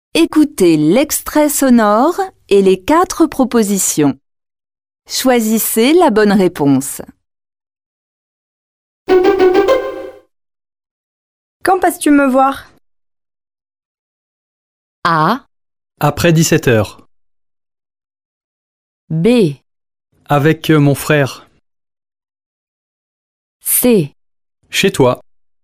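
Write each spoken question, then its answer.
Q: Quand passes-tu me voir?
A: A: Après 17 heures.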